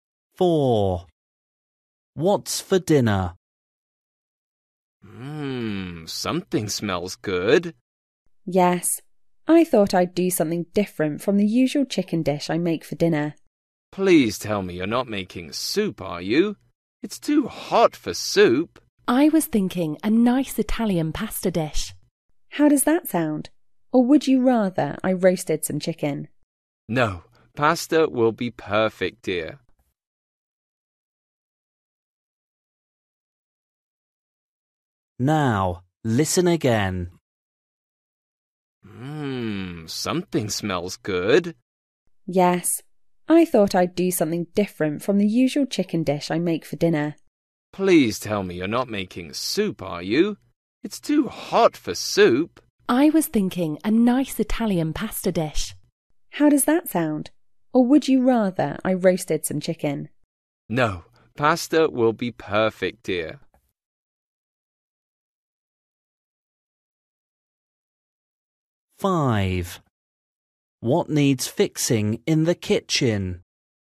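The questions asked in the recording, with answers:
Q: What's for dinner?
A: Italian pasta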